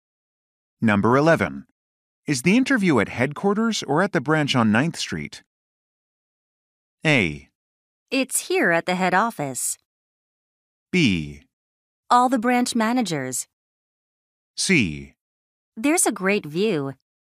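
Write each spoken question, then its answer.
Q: Is the interview at headquarters or at the branch on 9th Street?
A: A: It's here at the head office.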